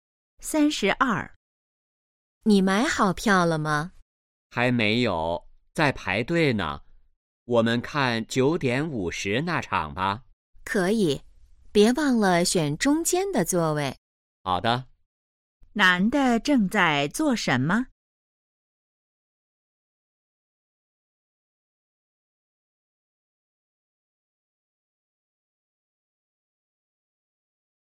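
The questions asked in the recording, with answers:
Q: 男的正在做什么?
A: 排队买票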